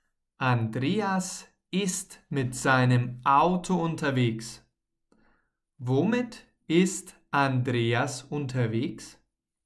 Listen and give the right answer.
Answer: Mit seinem Auto. Andreas ist mit seinem Auto unterwegs.